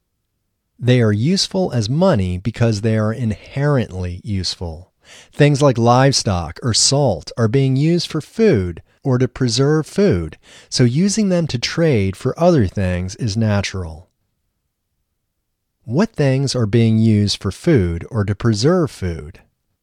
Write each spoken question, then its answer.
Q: What things are being used for food or to preserve food?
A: Livestock and salt are being used for food or to preserve food.